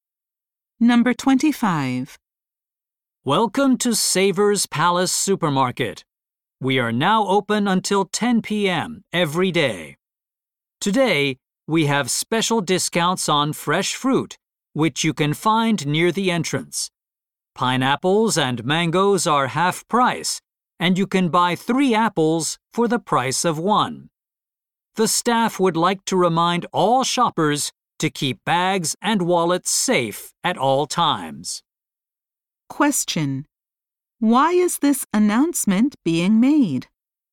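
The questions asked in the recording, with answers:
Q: Why is this announcement being made?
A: To tell shoppers about special discounts on fruit.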